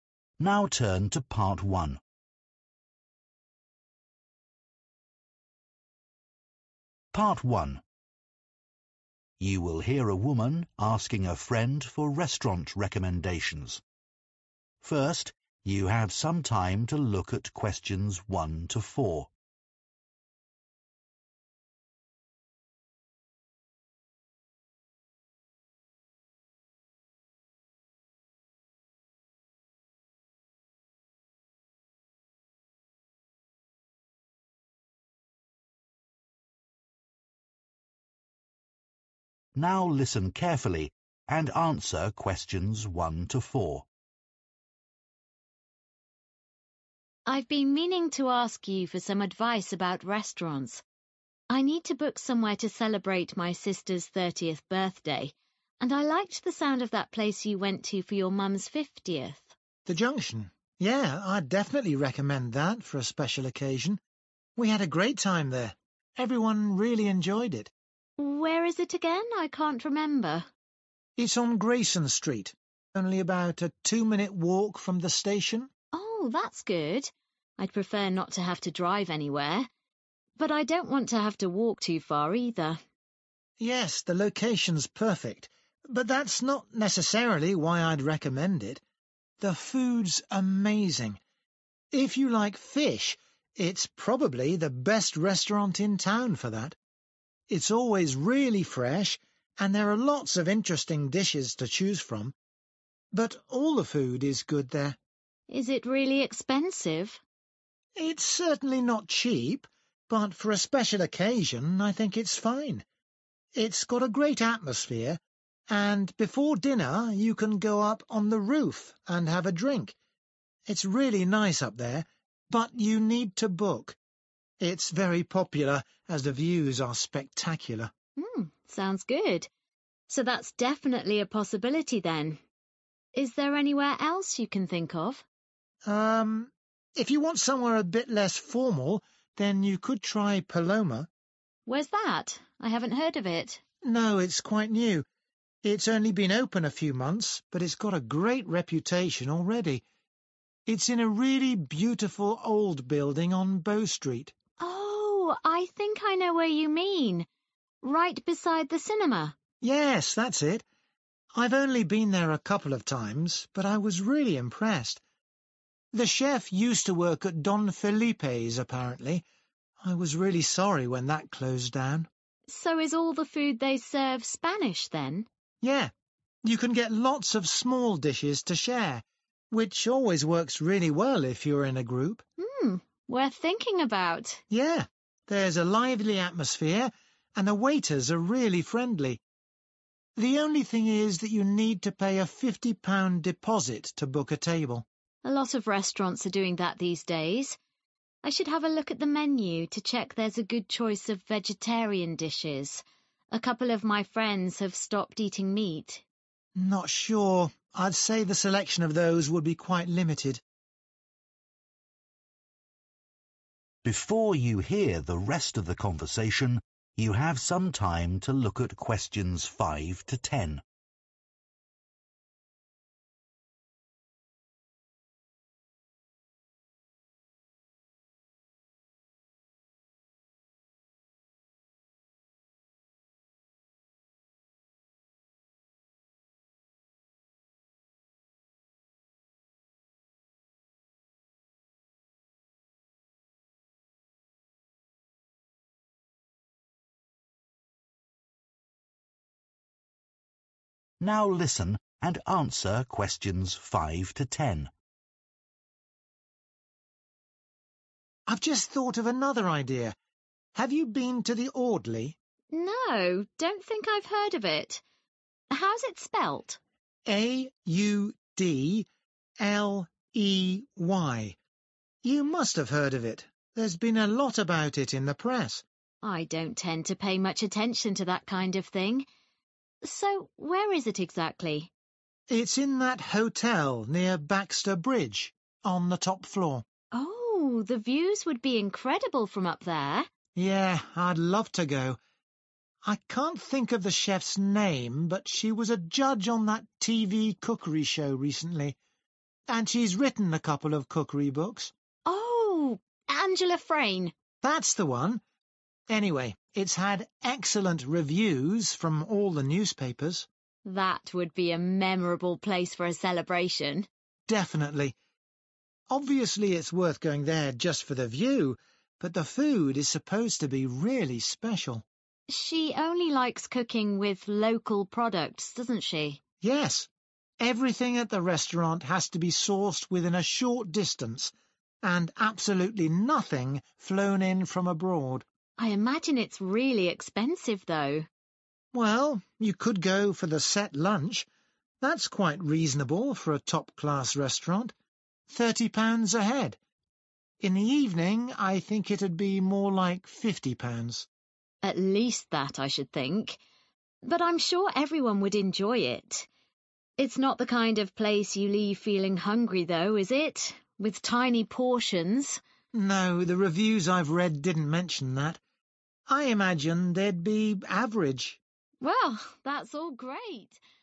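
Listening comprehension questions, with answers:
Complete the notes below. Write ONE WORD AND/ OR A NUMBER for each answer.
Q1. Good for people who are especially keen on (1)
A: fish

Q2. The (2) is a good place for a drink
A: roof

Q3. (3) food, good for sharing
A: Spanish

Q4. A limited selection of (4) Food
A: vegetarian

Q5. The (5)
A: Audley

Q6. At the top of a (6)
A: hotel

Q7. All the (7) are very good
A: reviews

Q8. Only uses (8) ingredients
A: local

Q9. Set lunch costs (9) per person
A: £30

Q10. Portions probably of (10) size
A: average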